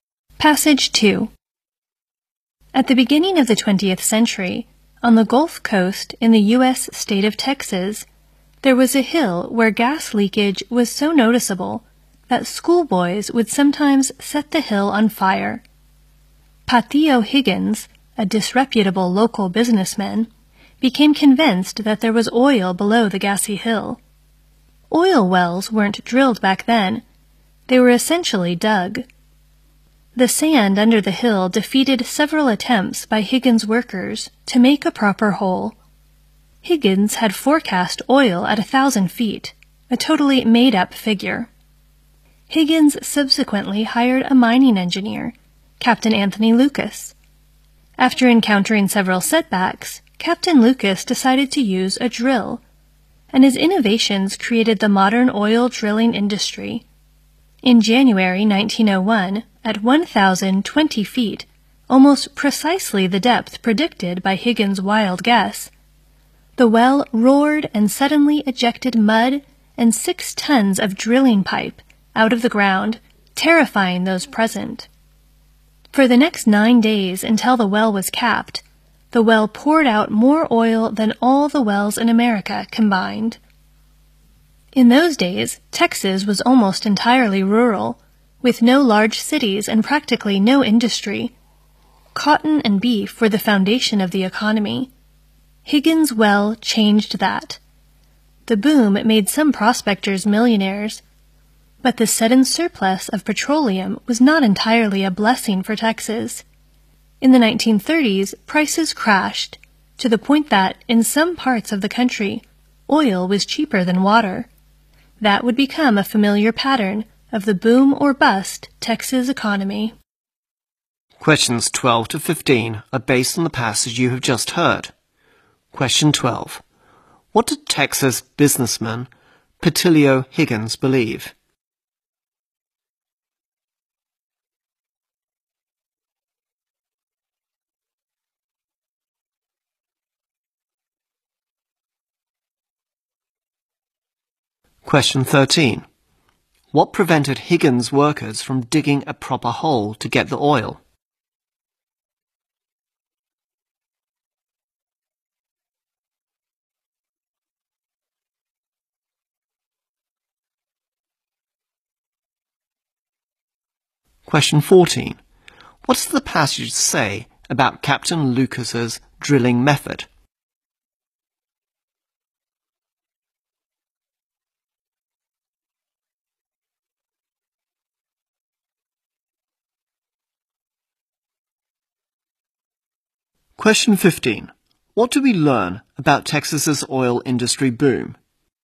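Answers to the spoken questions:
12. That there was oil below the gassy hill
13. The sand under the hill
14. His innovations created the modern oil drilling industry
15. It made some people millionaires, but the surplus caused prices to crash, starting a boom-and-bust pattern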